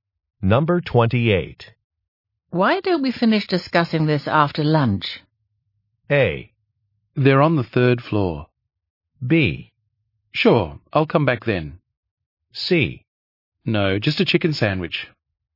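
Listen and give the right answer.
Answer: B: Sure, I'll come back then.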